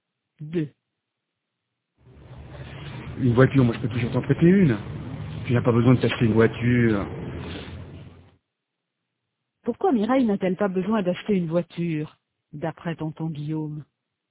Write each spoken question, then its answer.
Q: Pourquoi Mireille n'a-t-elle pas besoin d'acheter une voiture, d'après tonton Guillaume?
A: Parce qu'il peut toujours lui en prêter une.